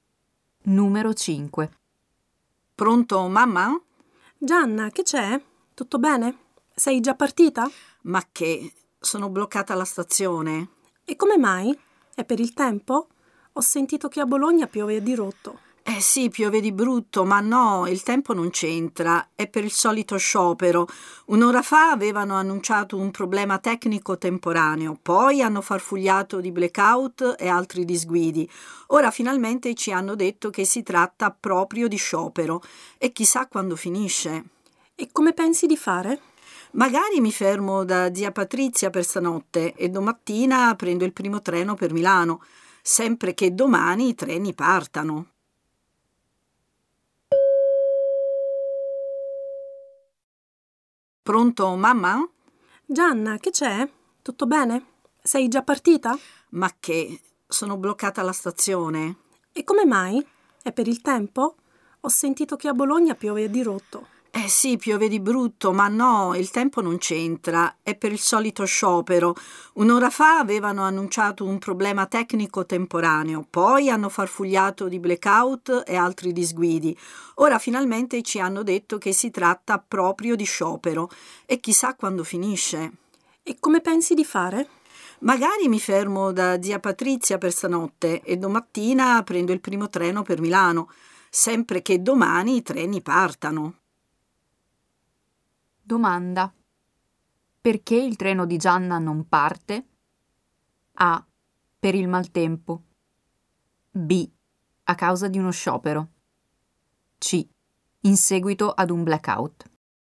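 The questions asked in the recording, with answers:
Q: Perché il treno di Gianna non parte?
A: B: A causa di uno sciopero.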